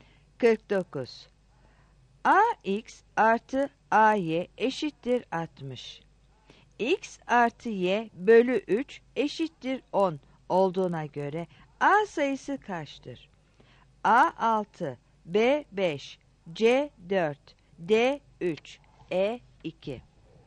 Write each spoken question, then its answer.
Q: X artı Y bölü 3 eşittir 10 olduğuna göre A sayısı kaçtır?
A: 49 E